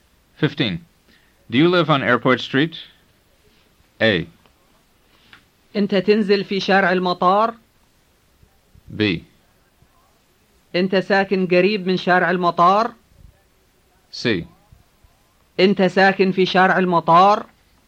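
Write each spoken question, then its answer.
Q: Do you live on Airport Street?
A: C: أنت ساكن في شارع المطار؟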